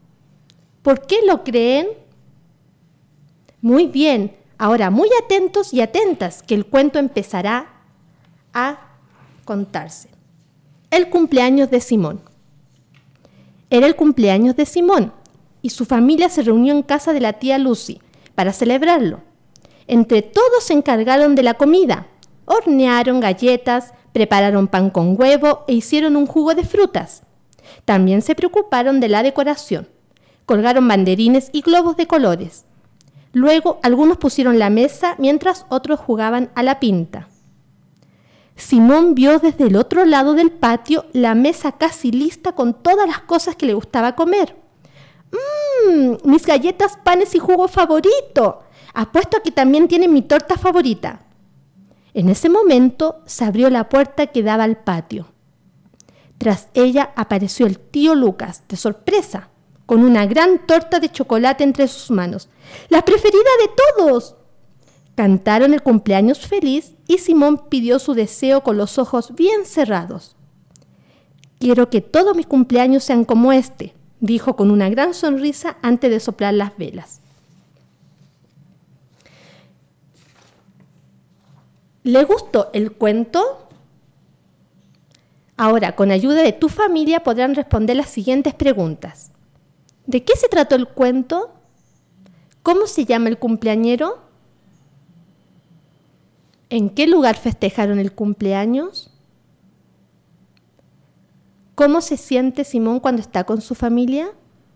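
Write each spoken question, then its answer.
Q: ¿De qué se trató el cuento?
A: Del cumpleaños de Simón, que se celebró con su familia

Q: ¿Cómo se llama el cumpleañero?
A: Simón

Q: ¿En qué lugar festejaron el cumpleaños?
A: En casa de la tía Lucy

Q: ¿Cómo se siente Simón cuando está con su familia?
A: Feliz, contento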